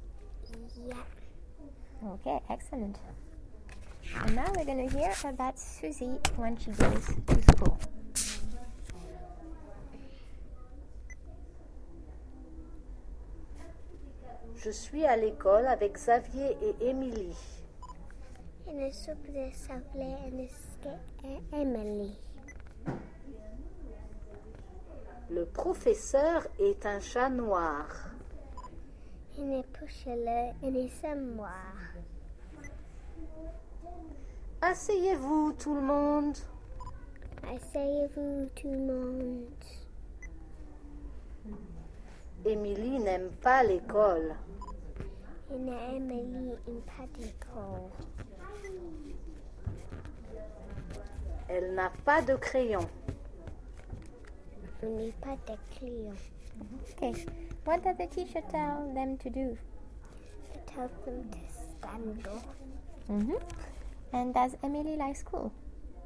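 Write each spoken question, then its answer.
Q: What does the teacher tell them to do?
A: Sit down

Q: And does Emily like school?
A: No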